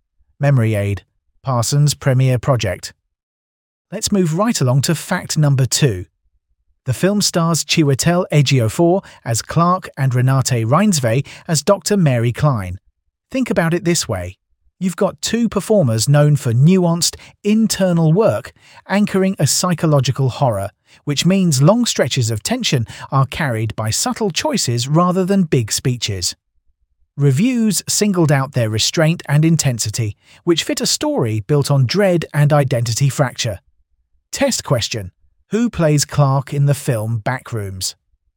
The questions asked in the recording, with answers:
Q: Who plays Clark in the film Backrooms?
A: Correct answer. Chiwetel Ejiofor.